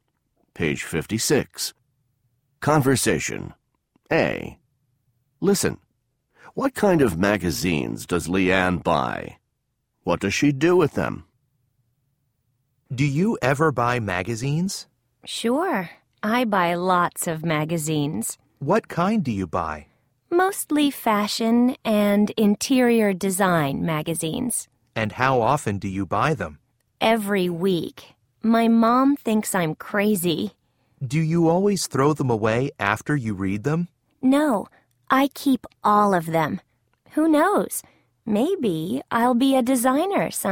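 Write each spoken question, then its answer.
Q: What kind of magazines does Leanne buy?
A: Mostly fashion and interior design magazines

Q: What does she do with them?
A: She keeps all of them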